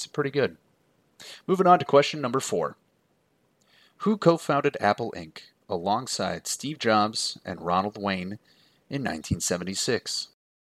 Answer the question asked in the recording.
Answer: And that was, of course, the other Steve besides Steve Jobs, Steve Wozniak.